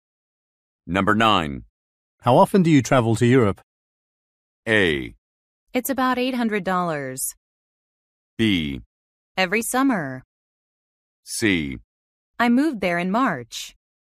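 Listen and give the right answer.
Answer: B: Every summer.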